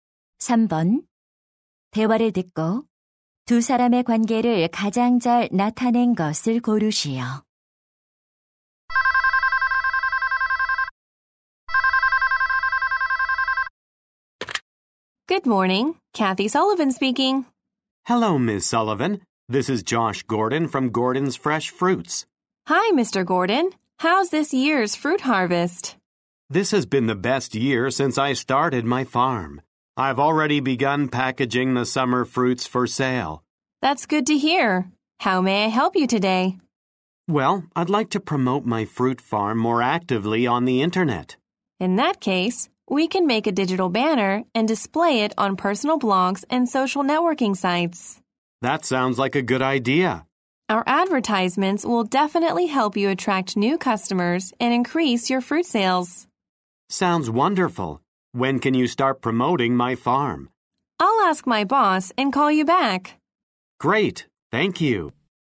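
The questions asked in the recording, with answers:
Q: 대화를 듣고 두 사람의 관계를 가장 잘 나타낸 것을 고르시오.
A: 과수원 주인 - 광고 회사 직원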